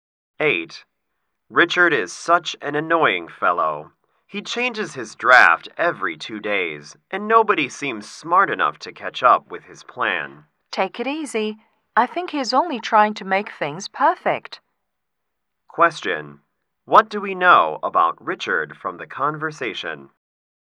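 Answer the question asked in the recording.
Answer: He is a perfectionist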